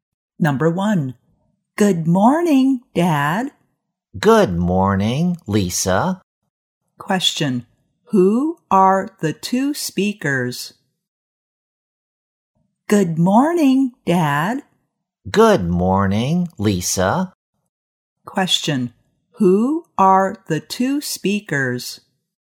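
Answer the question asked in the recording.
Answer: A father and his daughter (Lisa)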